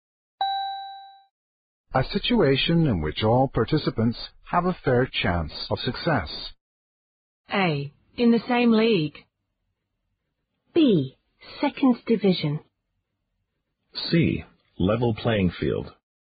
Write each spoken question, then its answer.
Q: A situation in which all participants have a fair chance of success.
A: The answer is C. A level playing field.